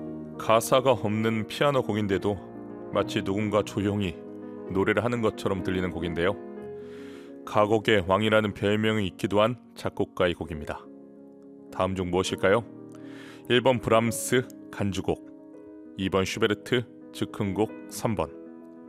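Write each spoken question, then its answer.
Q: 다음 중 무엇일까요? 1번 브람스 간주곡, 2번 슈베르트 즉흥곡, 3번.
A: 2: 슈베르트 즉흥곡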